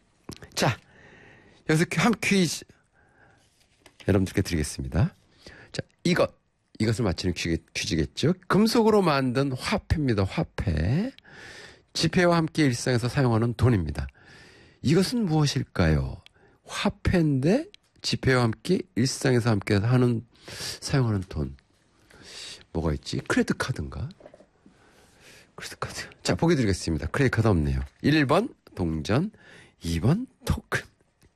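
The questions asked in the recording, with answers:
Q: 이것은 무엇일까요? 화폐인데 지폐와 함께 일상에서 함께 사용하는 돈.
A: 1번: 동전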